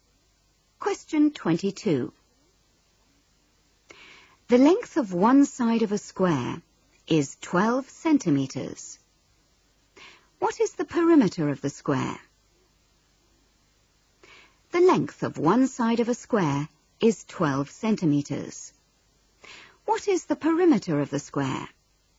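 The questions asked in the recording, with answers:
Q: What is the perimeter of the square?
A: 48 centimetres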